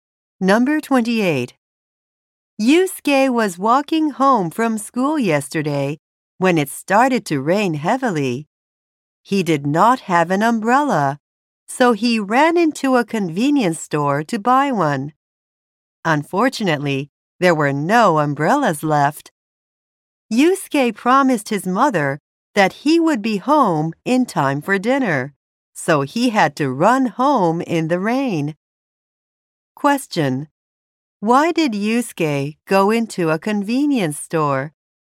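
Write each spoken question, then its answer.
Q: Why did Yusuke go into a convenience store?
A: To buy an umbrella.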